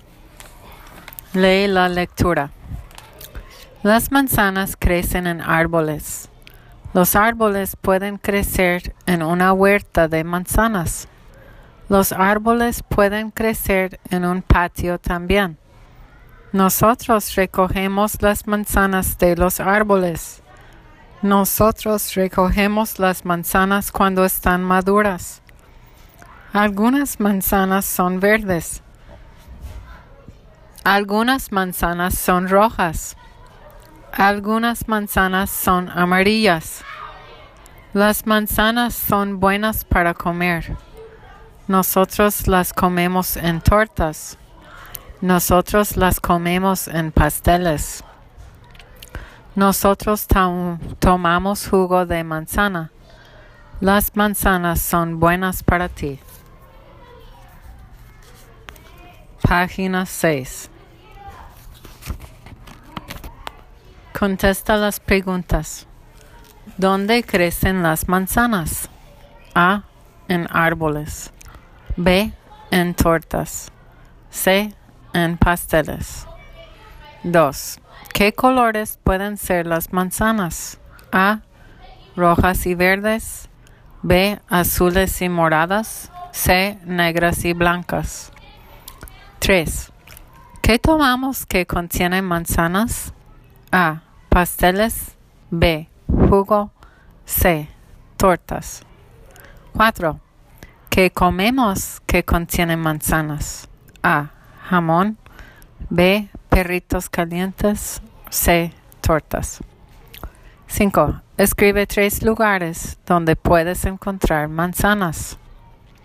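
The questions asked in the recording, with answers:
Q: ¿Dónde crecen las manzanas?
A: A: En árboles.

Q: ¿Qué colores pueden ser las manzanas?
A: A: Rojas y verdes.

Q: ¿Qué tomamos que contiene manzanas?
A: B: Jugo.

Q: ¿Qué comemos que contiene manzanas?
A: C: Tortas.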